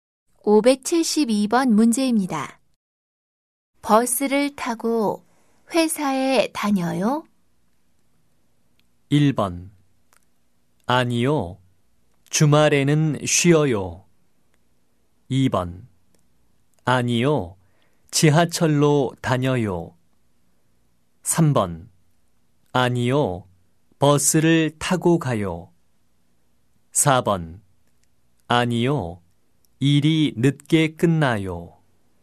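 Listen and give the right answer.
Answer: 2: 아니요. 지하철로 다녀요.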